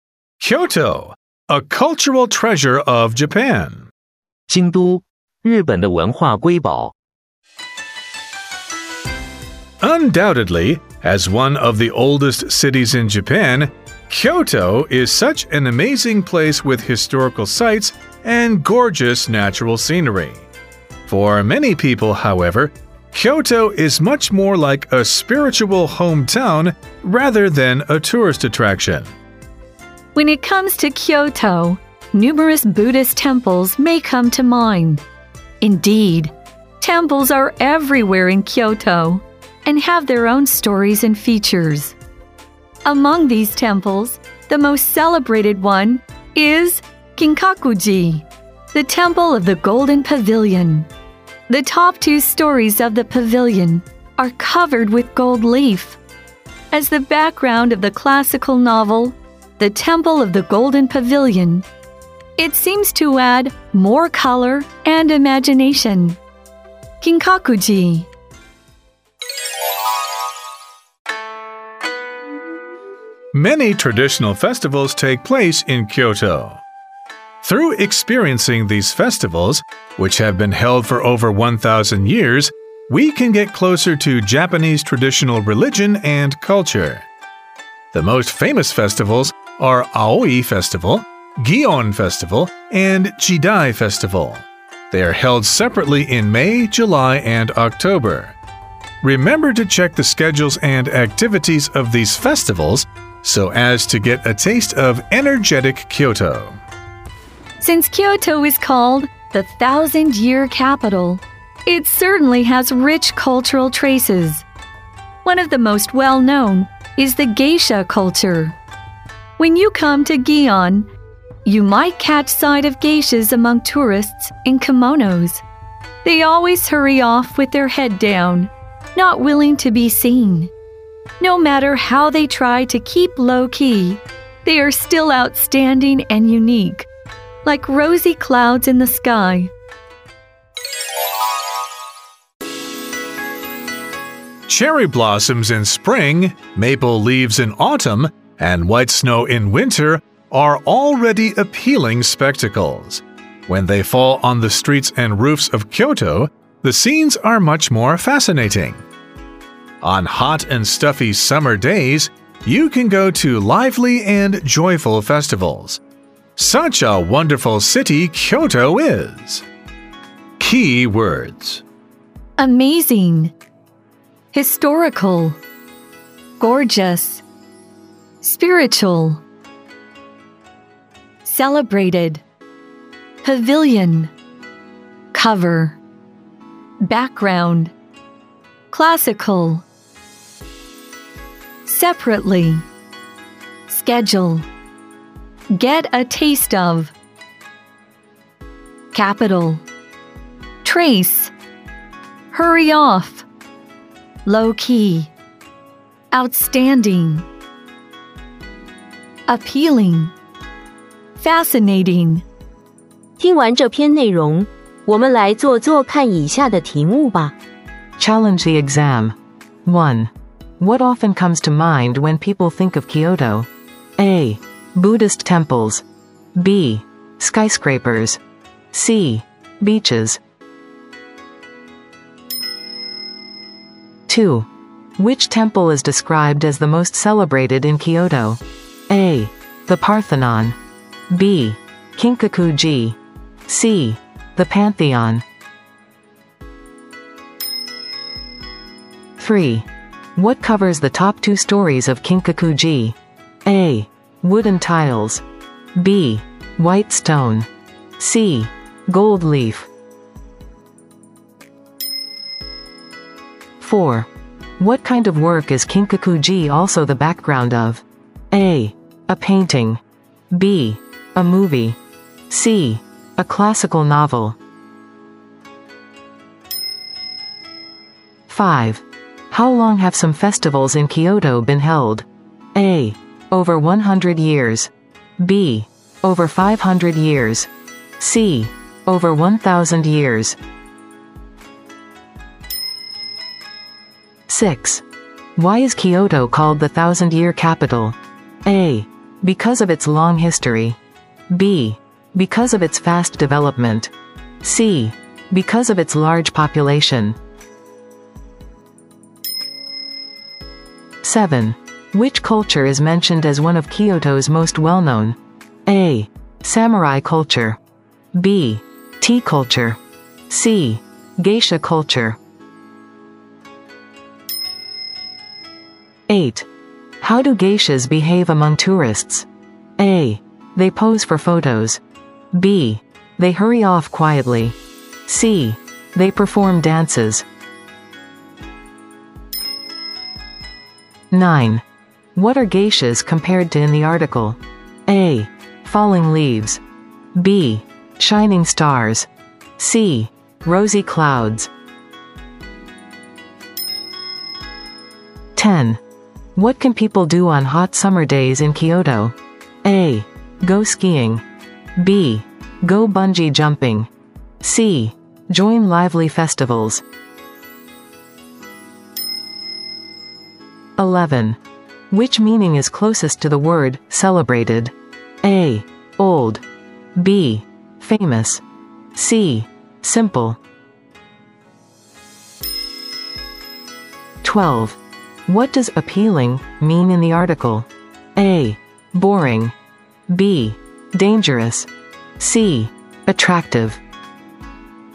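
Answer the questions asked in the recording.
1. A: Buddhist temples.
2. B: Kinkakuji.
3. C: Gold leaf.
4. C: A classical novel.
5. C: Over 1,000 years.
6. A: Because of its long history.
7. C: Geisha culture.
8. B: They hurry off quietly.
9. C: Rosy clouds.
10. C: Join lively festivals.
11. B: Famous.
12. C: Attractive.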